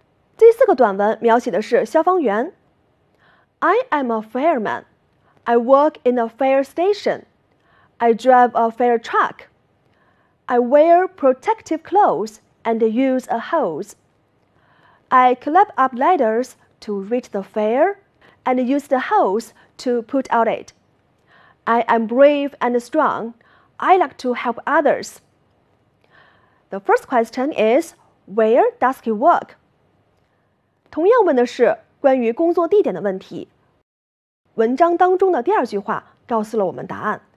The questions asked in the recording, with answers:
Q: where does he work?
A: He works in a police station.